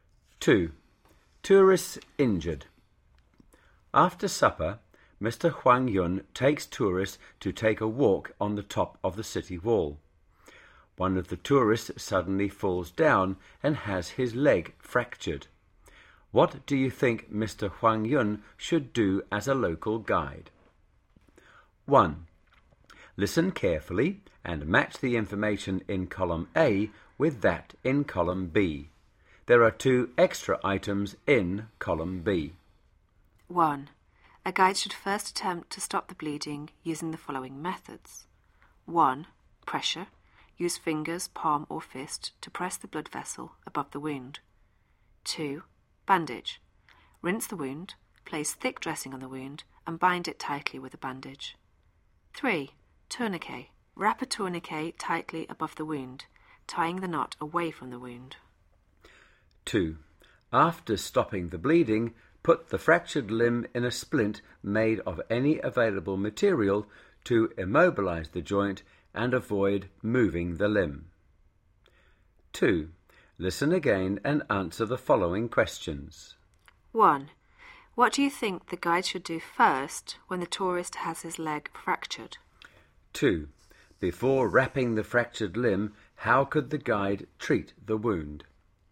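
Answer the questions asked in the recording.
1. Stop the bleeding first
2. Stop the bleeding by pressure, a bandage (rinse the wound, put a thick dressing on it and bind it tightly) or a tourniquet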